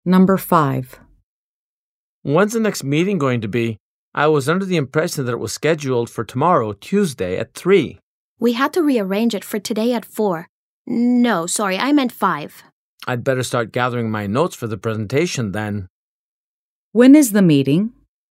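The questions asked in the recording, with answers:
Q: When is the meeting?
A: Today at 5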